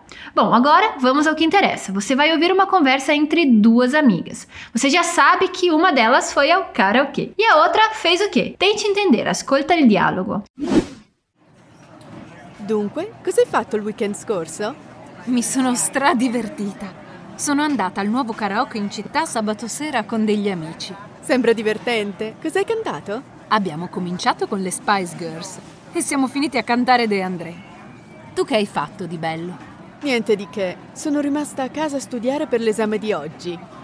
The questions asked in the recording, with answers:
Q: Você já sabe que uma delas foi ao karaokê e a outra fez o quê?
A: Você entendeu que uma delas ficou estudando enquanto a outra saiu para cantar?